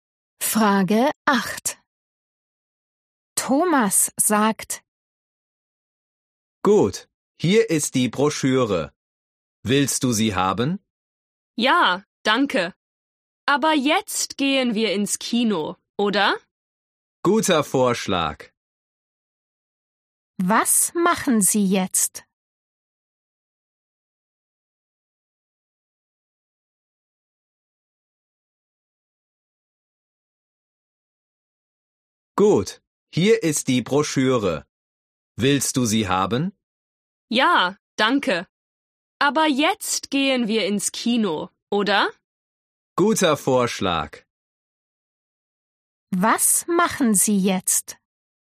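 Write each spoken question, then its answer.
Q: Was machen Sie jetzt?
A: Sie gehen ins Kino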